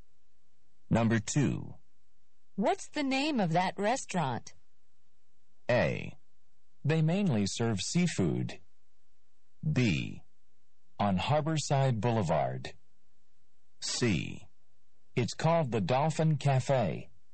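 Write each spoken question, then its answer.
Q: What's the name of that restaurant?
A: C: It's called the Dolphin Cafe.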